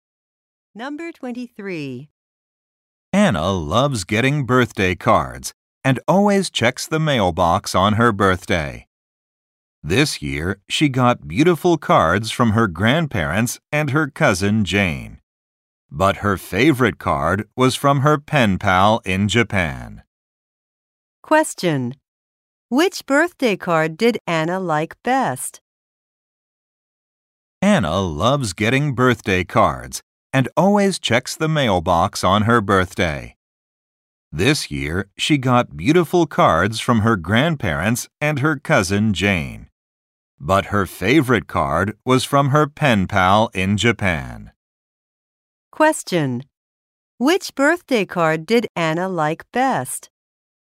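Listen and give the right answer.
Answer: The one from her pen pal in Japan.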